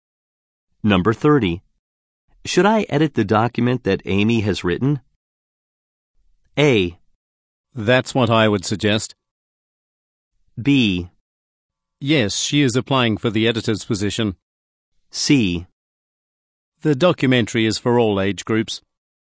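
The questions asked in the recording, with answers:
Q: Should I edit the document that Amy has written?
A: A: That's what I would suggest.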